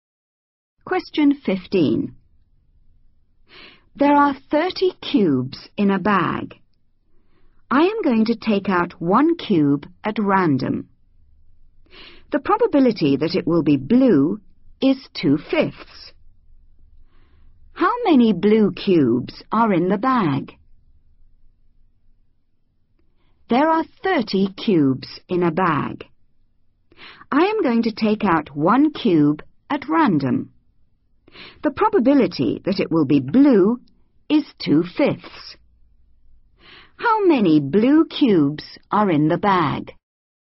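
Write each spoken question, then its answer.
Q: How many blue cubes are in the bag?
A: 12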